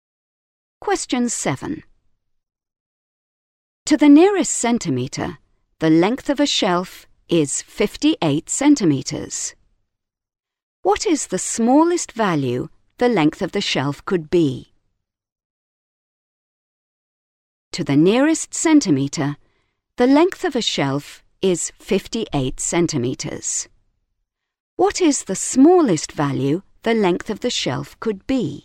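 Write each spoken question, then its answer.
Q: What is the smallest value the length of the shelf could be?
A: 57.5 centimetres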